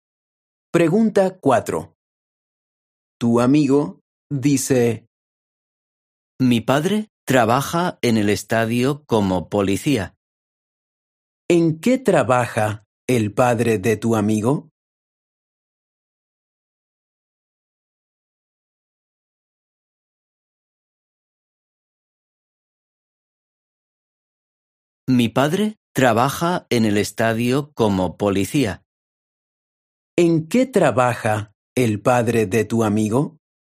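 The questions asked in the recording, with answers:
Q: ¿En qué trabaja el padre de tu amigo?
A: Es policía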